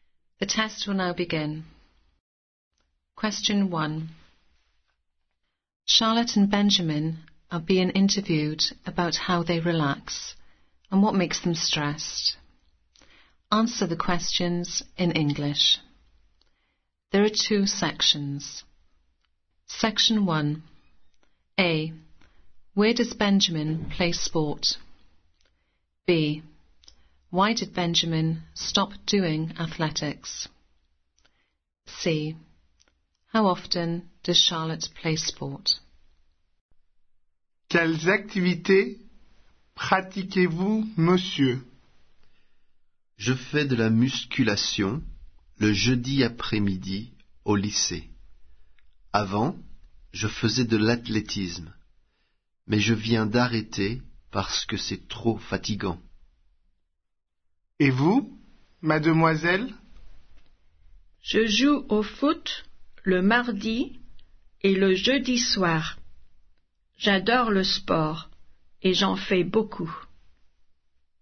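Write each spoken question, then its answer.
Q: Where does Benjamin play sport?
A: At school (lycée)

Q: Why did Benjamin stop doing athletics?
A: It was too tiring

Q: How often does Charlotte play sport?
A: Twice a week (Tuesday and Thursday evenings)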